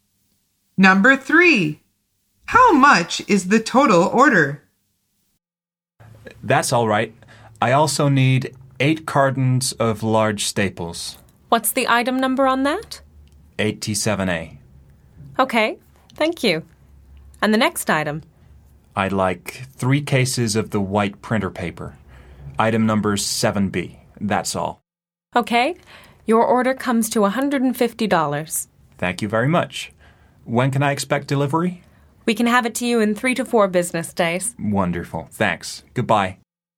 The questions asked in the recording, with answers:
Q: How much is the total order?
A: The answer is $150.